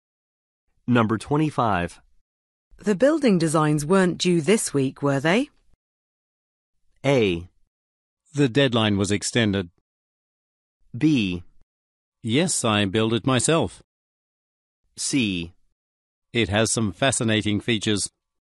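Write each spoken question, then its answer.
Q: The building designs weren't due this week, were they?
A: A: The deadline was extended.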